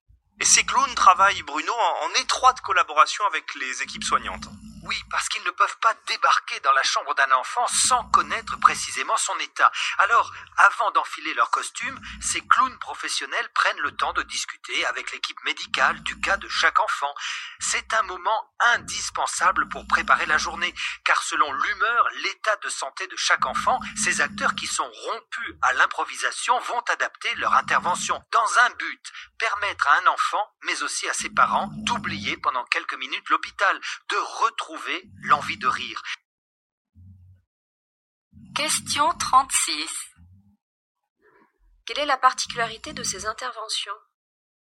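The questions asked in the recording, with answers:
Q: Quelle est la particularité de ces interventions?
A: Elles sont adaptées à chaque enfant après discussion avec l'équipe médicale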